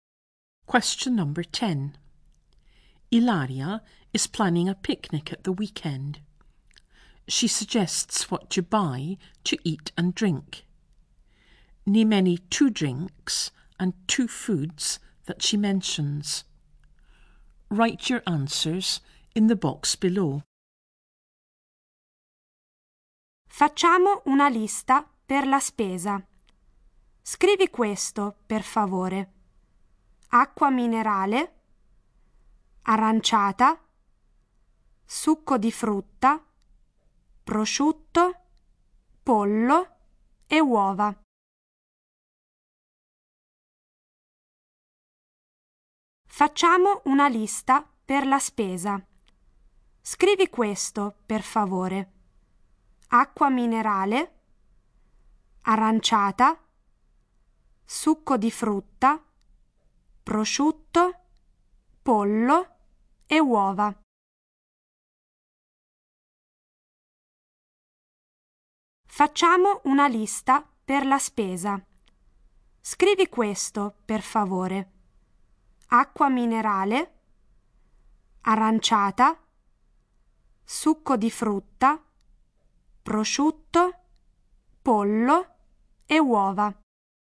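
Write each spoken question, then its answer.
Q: Name any 2 drinks and 2 foods that she mentions.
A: Drinks: mineral water, orangeade, fruit juice; foods: ham, chicken, eggs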